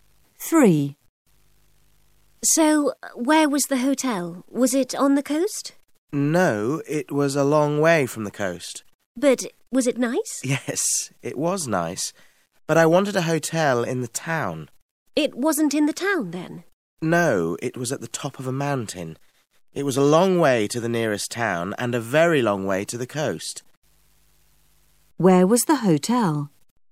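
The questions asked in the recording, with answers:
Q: Where was the hotel?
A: At the top of a mountain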